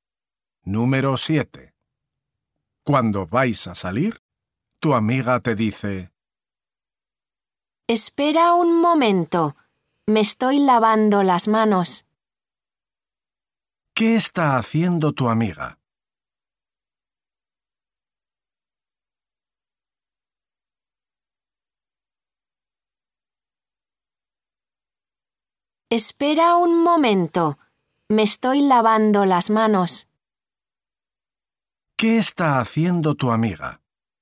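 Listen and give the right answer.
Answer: lavándose las manos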